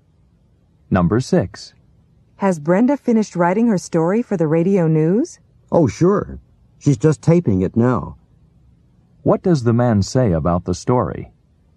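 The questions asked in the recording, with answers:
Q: What does the man say about the story?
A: Brenda is recording it now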